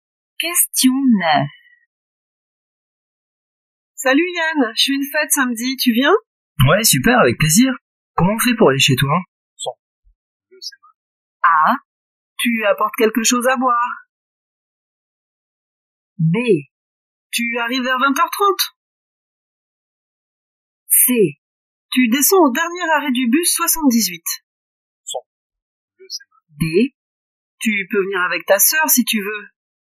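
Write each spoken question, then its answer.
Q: Comment on fait pour aller chez toi?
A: C: Tu descends au dernier arrêt du bus 78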